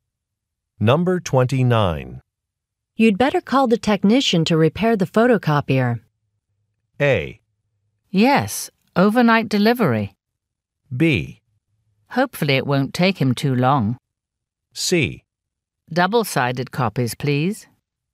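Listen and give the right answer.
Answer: B: Hopefully it won't take him too long.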